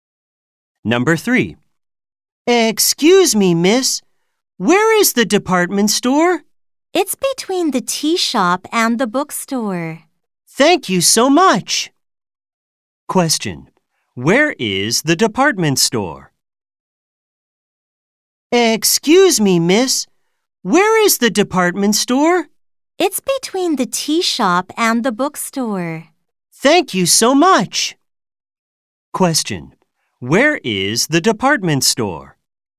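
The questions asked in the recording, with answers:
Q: Where is the department store?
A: Between the tea shop and the bookstore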